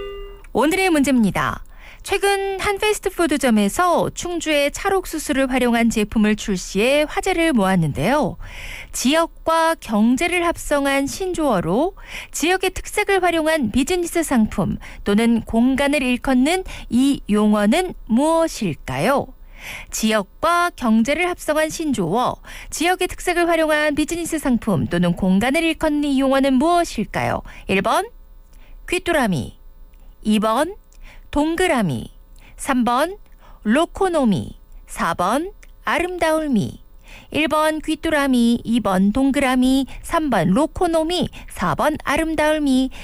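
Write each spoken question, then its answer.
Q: 지역과 경제를 합성한 신조어로 지역의 특색을 활용한 비즈니스 상품 또는 공간을 일컫는 이 용어는 무엇일까요?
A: 3: 로코노미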